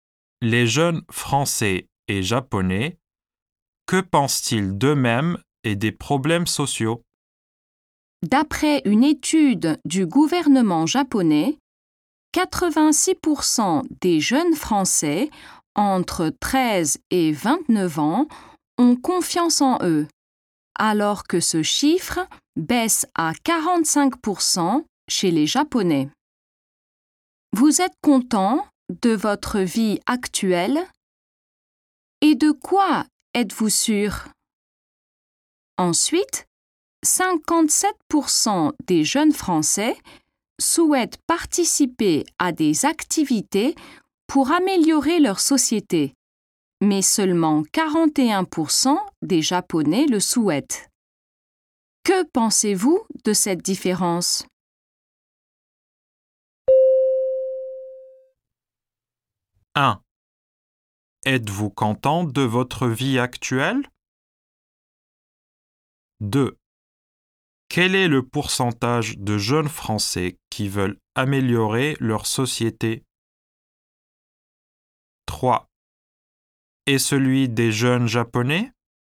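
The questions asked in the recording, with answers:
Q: Quel est le pourcentage de jeunes Français qui veulent améliorer leur société?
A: 57%

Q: Et celui des jeunes Japonais ?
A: 41%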